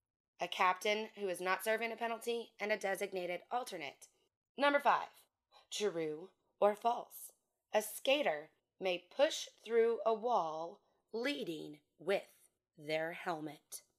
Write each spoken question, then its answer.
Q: A skater may push through a wall leading with their helmet.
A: This is false.